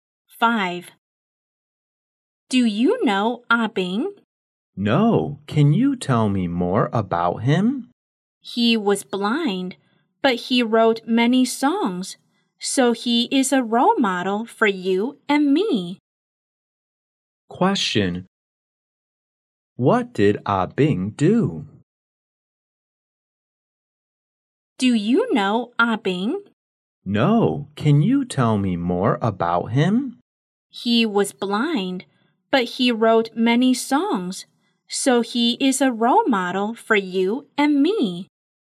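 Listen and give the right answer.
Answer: He wrote many songs.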